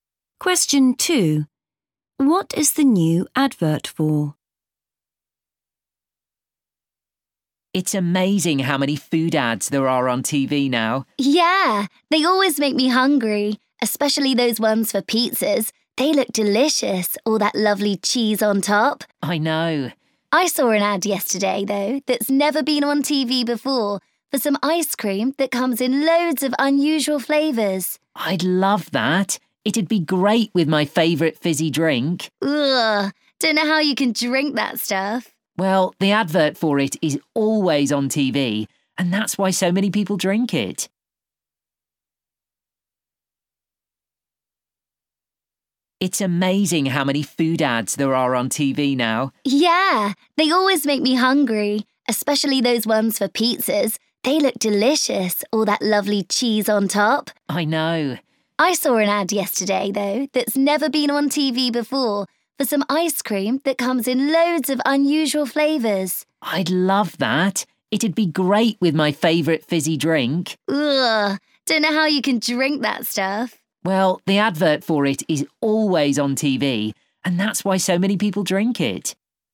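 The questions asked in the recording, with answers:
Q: What is the new advert for?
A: ice cream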